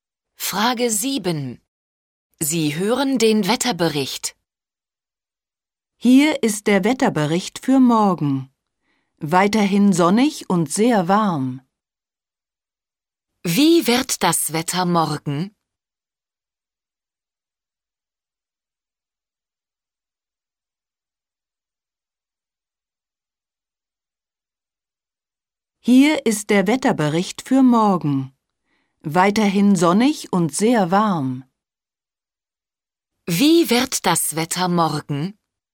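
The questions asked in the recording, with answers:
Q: Wie wird das Wetter morgen?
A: Sonnig und sehr warm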